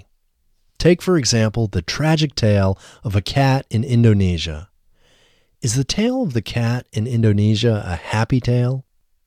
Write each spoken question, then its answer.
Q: Is the tale of the cat in Indonesia a happy tale?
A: No, the tale of the cat in Indonesia isn't a happy tale.